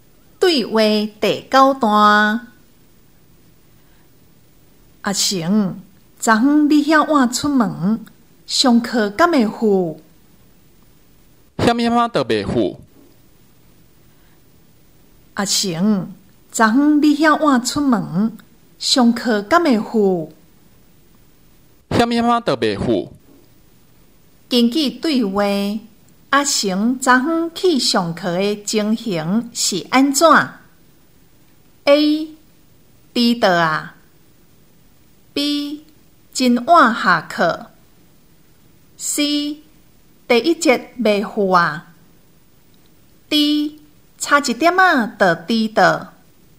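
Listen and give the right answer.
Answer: D: 差一点啊,就迟到。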